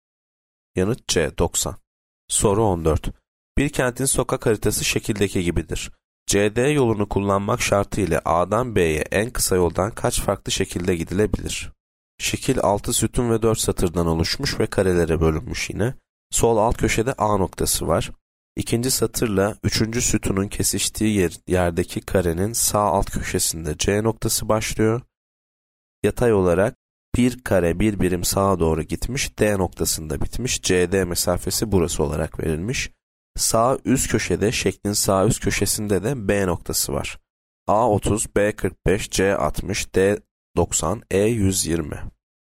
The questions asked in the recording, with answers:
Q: CD yolunu kullanmak şartı ile A'dan B'ye en kısa yoldan kaç farklı şekilde gidilebilir?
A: Yanıt C 60.